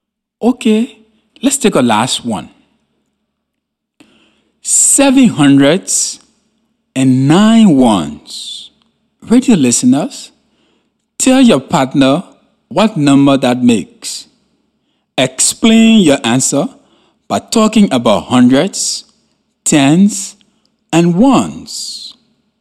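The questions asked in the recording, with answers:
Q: Seven hundreds and nine ones.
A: 709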